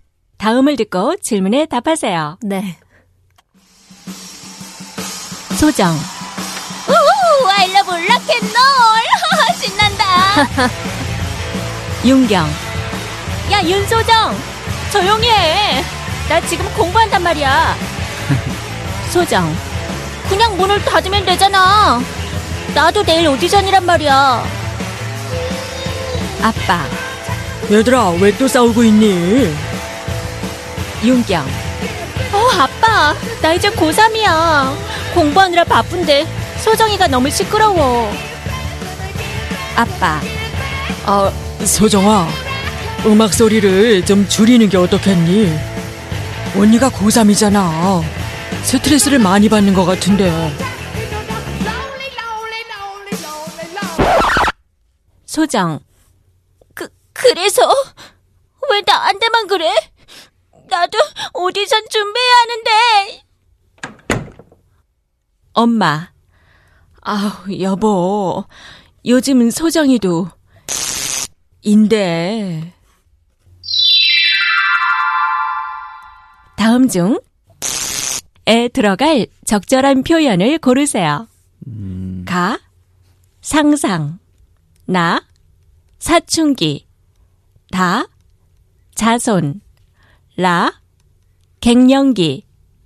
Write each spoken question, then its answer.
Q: 다음 중에 들어갈 적절한 표현을 고르세요. 가, 상상, 나, 사춘기, 다, 자손, 라, 갱년기.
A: Of course, the answer is na sachungi.